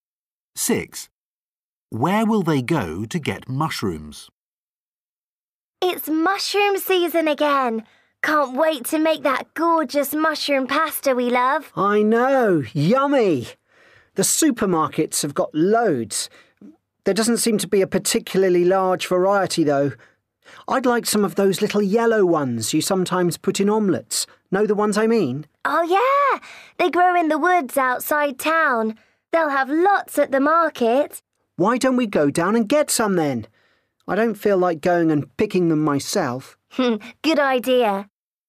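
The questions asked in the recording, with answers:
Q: Where will they go to get mushrooms?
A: The market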